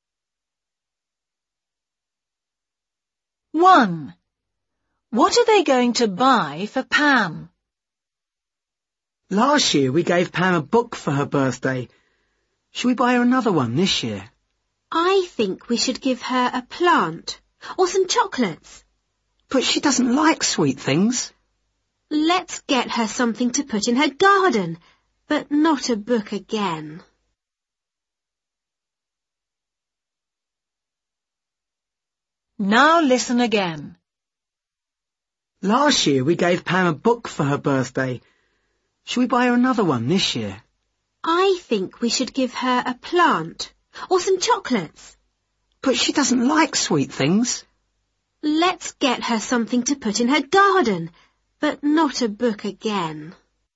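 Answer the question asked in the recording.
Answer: a plant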